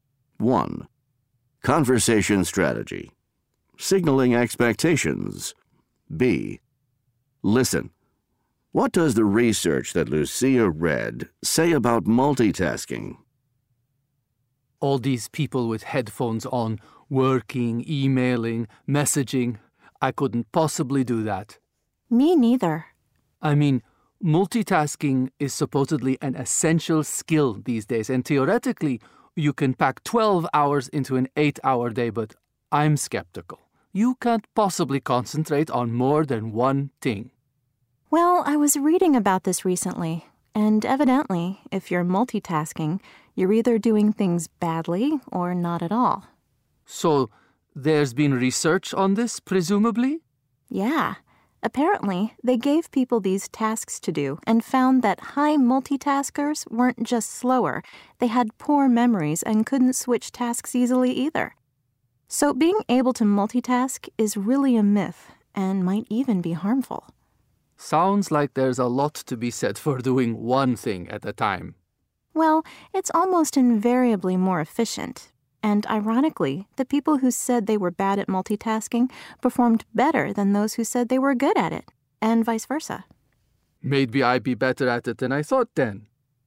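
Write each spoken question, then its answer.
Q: What does the research that Lucia read say about multitasking?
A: If you multitask you do things badly or not at all; high multitaskers were slower, had poor memories and couldn't switch tasks easily, so multitasking is a myth and may be harmful.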